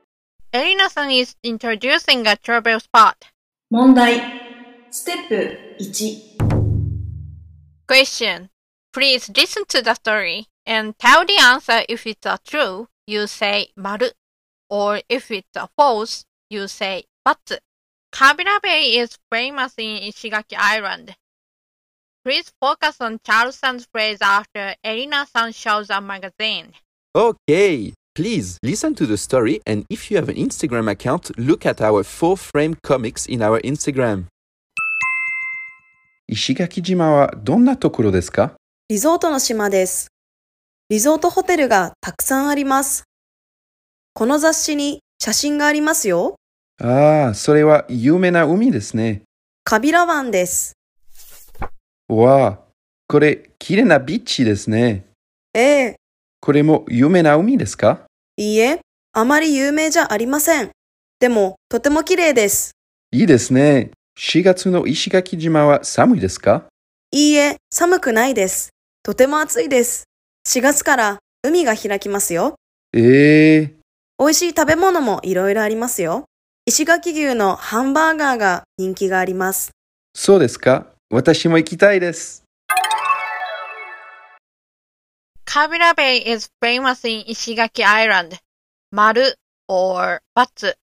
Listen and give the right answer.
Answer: So the answer is 丸。